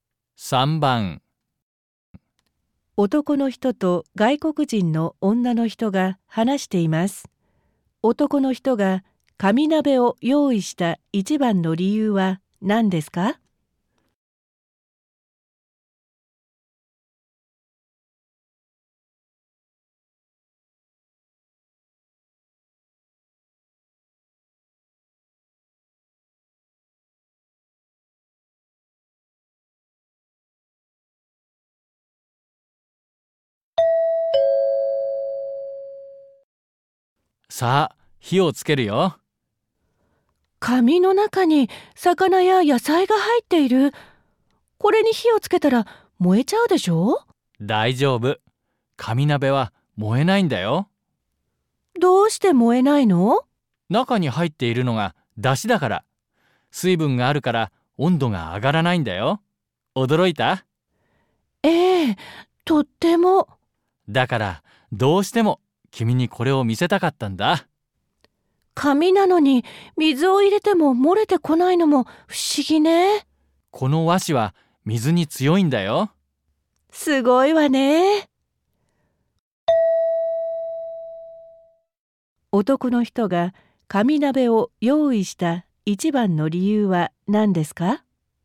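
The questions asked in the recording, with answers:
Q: 男の人が紙鍋を用意した一番の理由は何ですか?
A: 紙が燃えないことを女の人に見せて驚かせたかったから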